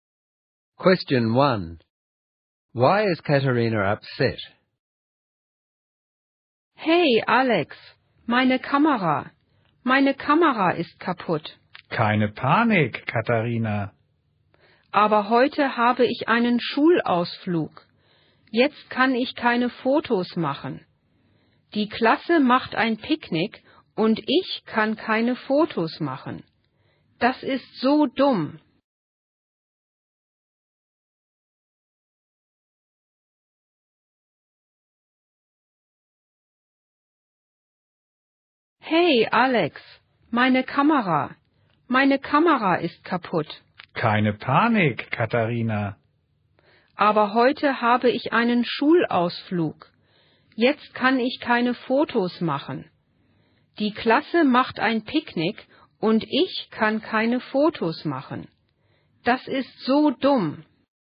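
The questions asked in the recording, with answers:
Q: Why is Katharina upset?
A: Her camera is broken, so she can't take photos on today's school excursion/picnic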